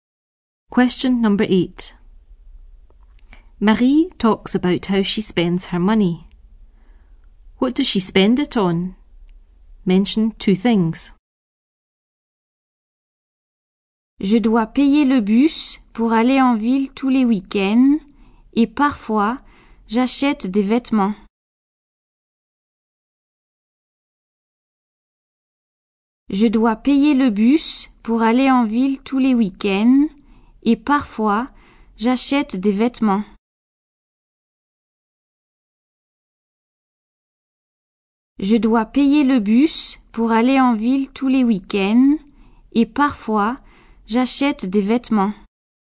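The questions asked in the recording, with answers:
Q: What does she spend it on?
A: The bus into town every weekend and sometimes clothes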